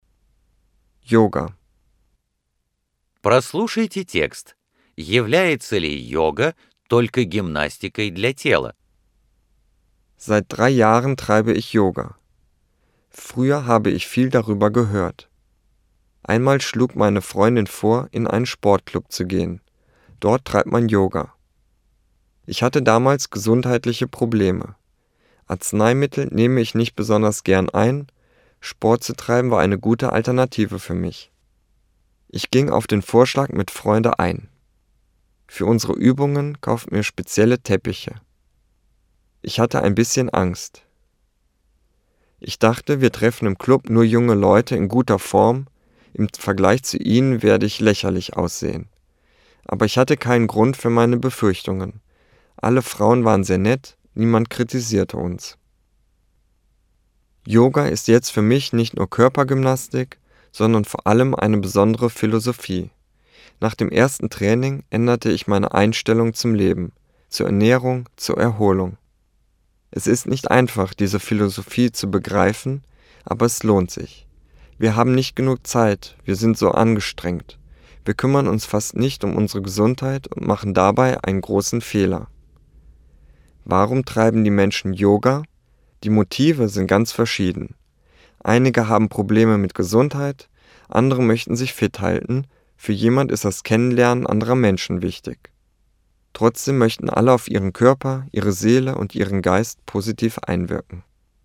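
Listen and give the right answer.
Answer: Нет, это прежде всего особая философия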